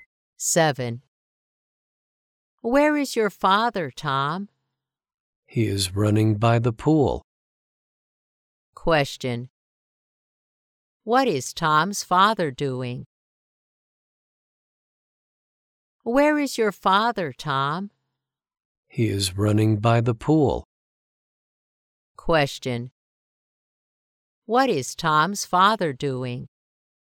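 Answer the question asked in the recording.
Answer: He is running by the pool.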